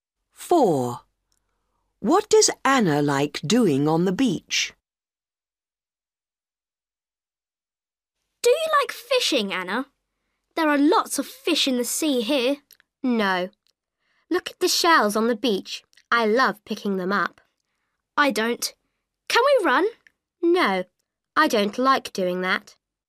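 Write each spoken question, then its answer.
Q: What does Anna like doing on the beach?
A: Picking up shells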